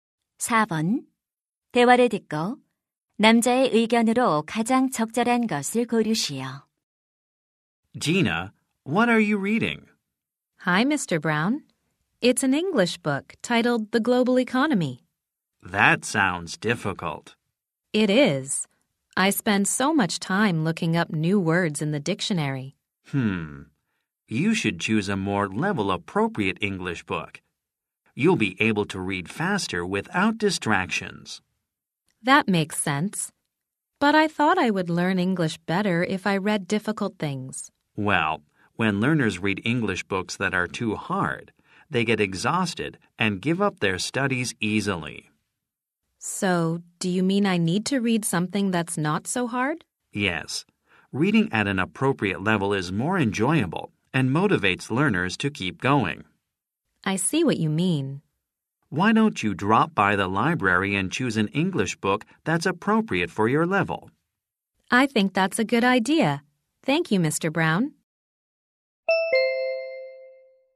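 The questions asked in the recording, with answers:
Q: 대화를 듣고 남자의 의견으로 가장 적절한 것을 고르시오.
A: 수준에 맞는 영어책을 읽어야 한다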